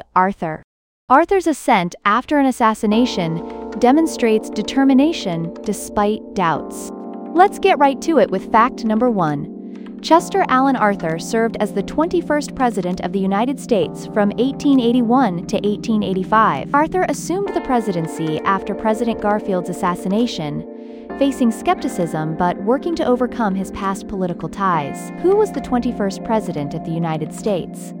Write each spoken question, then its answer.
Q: Who was the 21st President of the United States?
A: Chester Alan Arthur.